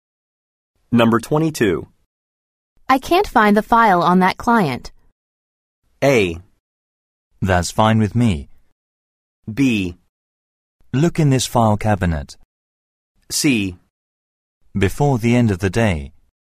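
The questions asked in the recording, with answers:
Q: I can't find the file on that client.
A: B: Look in this file cabinet.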